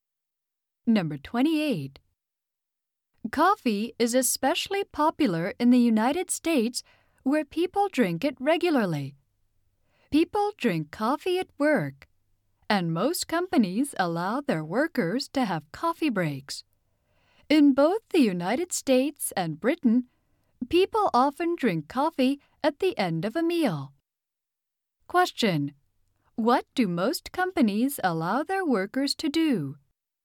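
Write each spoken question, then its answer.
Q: What do most companies allow their workers to do?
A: Have coffee breaks.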